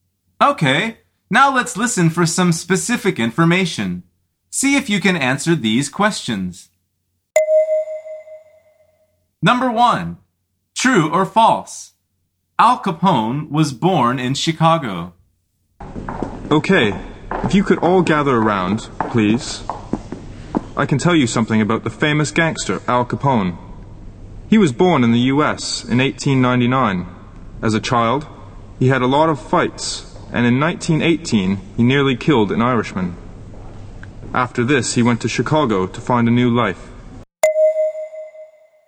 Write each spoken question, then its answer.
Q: Al Capone was born in Chicago.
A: The answer is false.